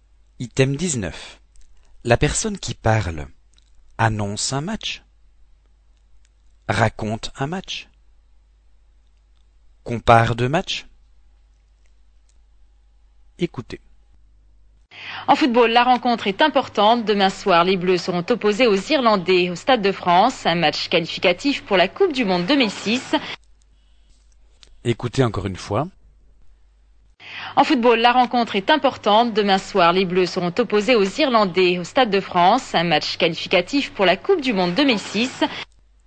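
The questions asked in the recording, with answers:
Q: La personne qui parle annonce un match, raconte un match, compare deux matchs.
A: annonce un match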